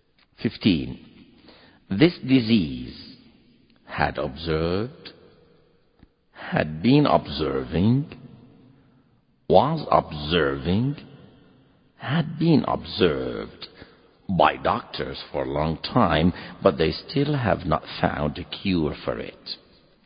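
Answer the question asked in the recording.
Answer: D: had been observed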